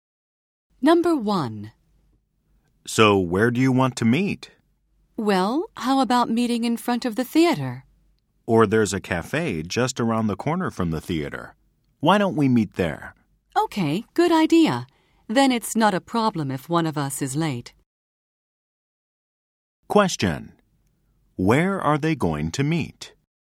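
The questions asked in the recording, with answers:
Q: Where are they going to meet?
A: At a cafe just around the corner from the theater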